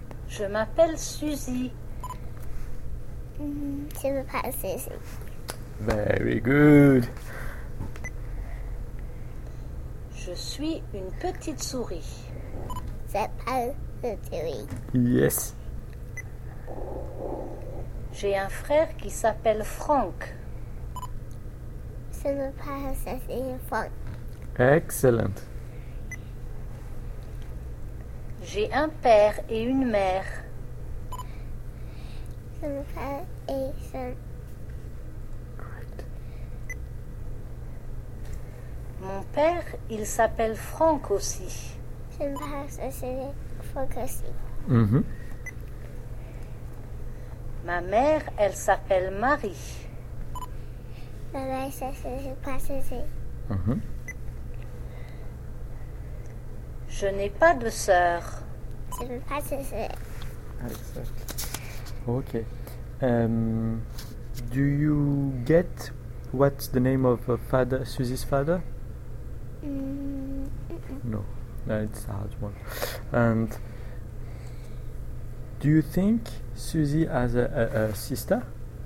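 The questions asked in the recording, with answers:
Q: Do you get what's the name of father Susie's father?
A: Franck

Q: And do you think Susie has a sister?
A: No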